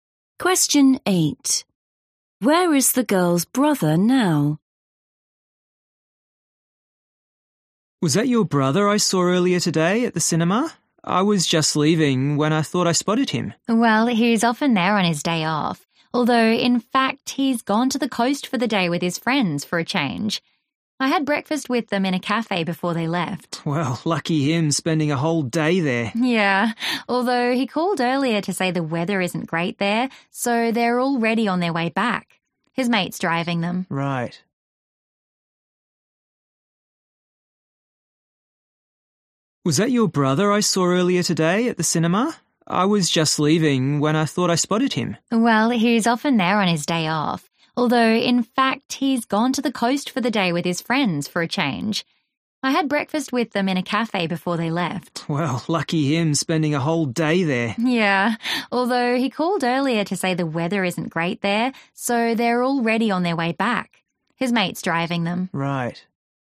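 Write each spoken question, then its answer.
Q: Where is the girl's brother now?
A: in his friend's car, on the way back from the coast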